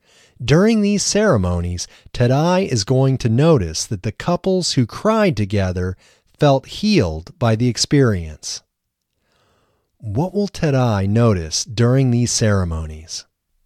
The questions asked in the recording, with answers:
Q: What will Tadai notice during these ceremonies?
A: During these ceremonies, Tadai is going to notice that the couples who cried together felt healed by the experience.